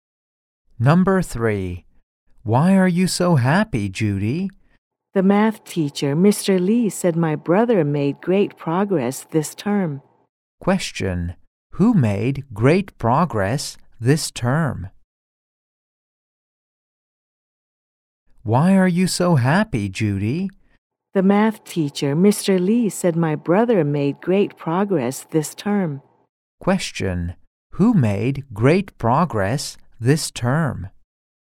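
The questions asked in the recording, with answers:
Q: Question, who made great progress?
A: Judy's brother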